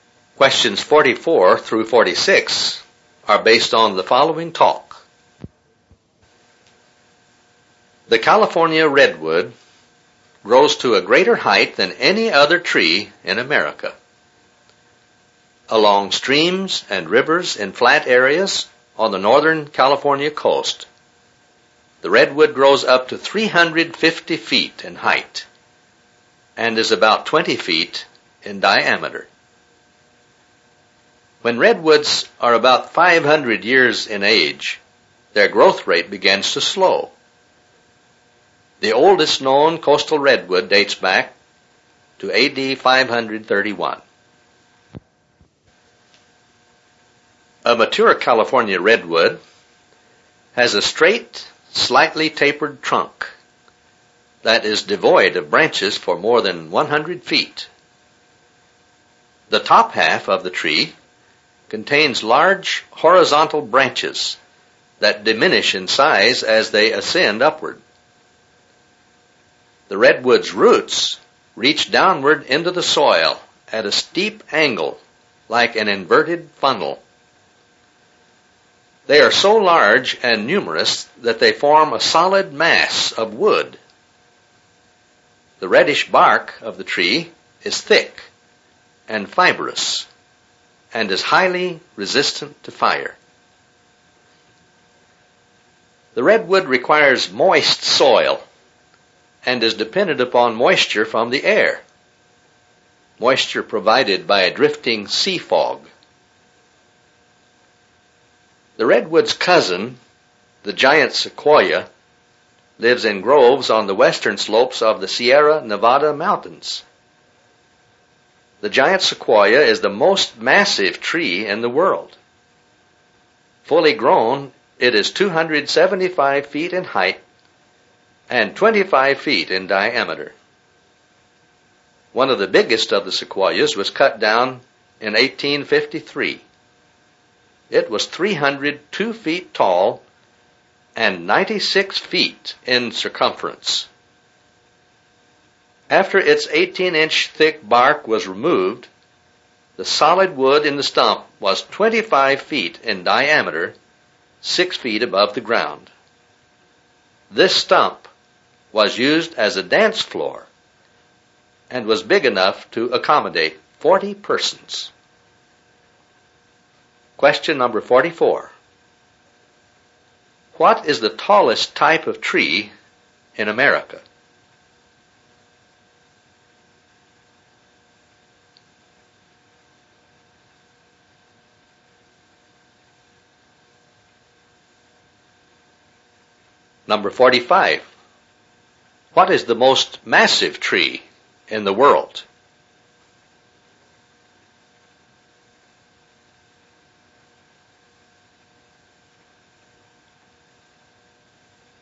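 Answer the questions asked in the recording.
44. The California redwood
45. The giant sequoia
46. 96 feet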